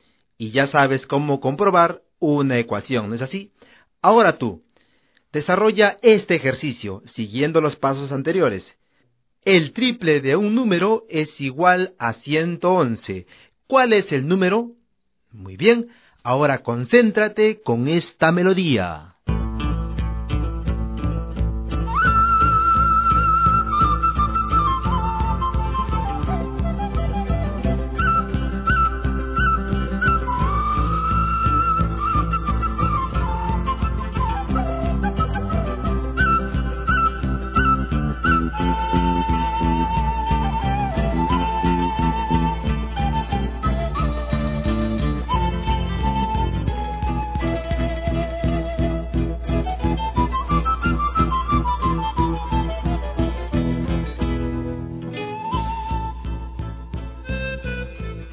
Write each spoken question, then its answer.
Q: El triple de un número es igual a 111. ¿Cuál es el número?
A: el número es 37